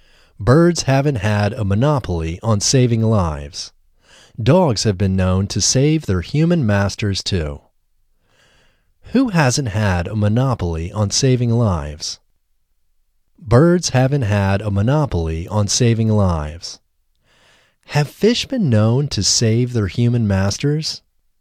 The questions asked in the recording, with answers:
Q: Who hasn't had a monopoly on saving lives?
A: Birds haven't had a monopoly on saving lives.